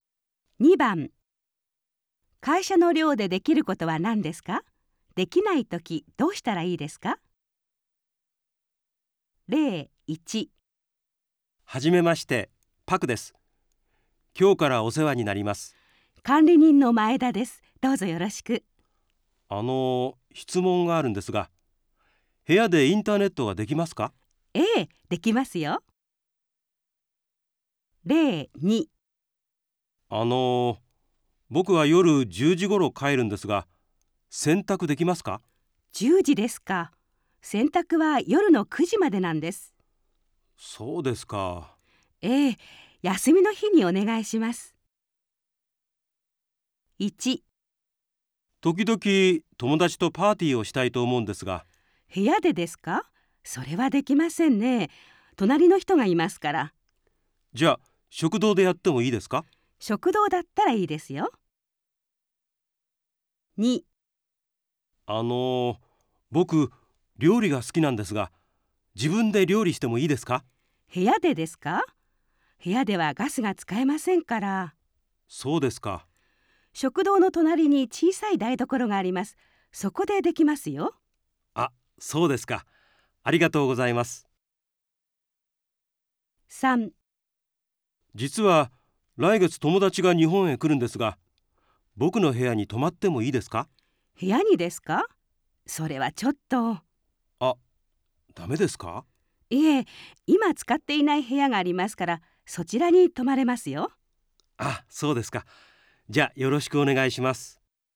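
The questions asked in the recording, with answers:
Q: 会社の寮でできることは何ですか?できないときどうしたらいいですか?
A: 部屋でパーティーはできない。食堂ならできる。

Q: 会社の寮でできることは何ですか?できないときどうしたらいいですか?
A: 部屋で料理はできない(ガスが使えない)。食堂の隣の小さい台所でできる。

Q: 会社の寮でできることは何ですか?できないときどうしたらいいですか?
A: 友達は自分の部屋に泊まれない。今使っていない部屋に泊まれる。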